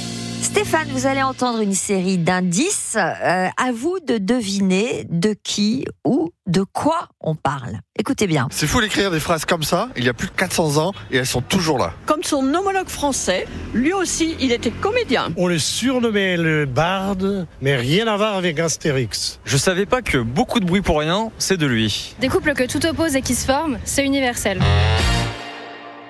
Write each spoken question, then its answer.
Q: À vous de deviner de qui ou de quoi on parle.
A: Shakespeare